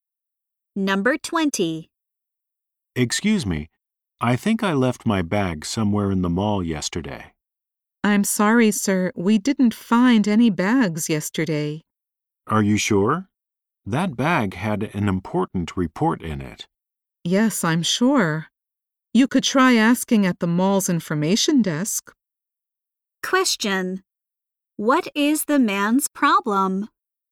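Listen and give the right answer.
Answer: He lost his bag with an important report in it.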